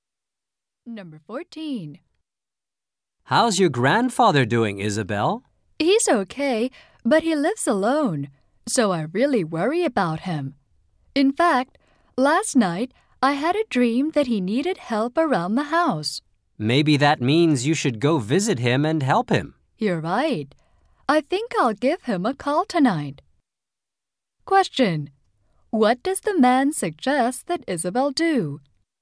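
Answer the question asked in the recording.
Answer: Go and visit her grandfather and help him.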